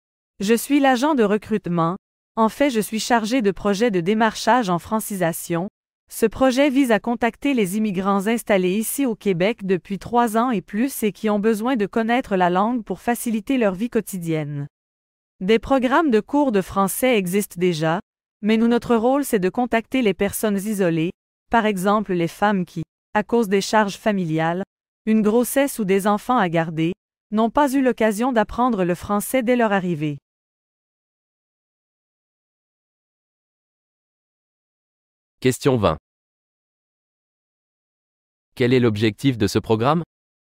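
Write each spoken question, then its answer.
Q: Quel est l'objectif de ce programme?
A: Contacter les immigrants isolés, installés au Québec depuis 3 ans et plus, qui ont besoin d'apprendre le français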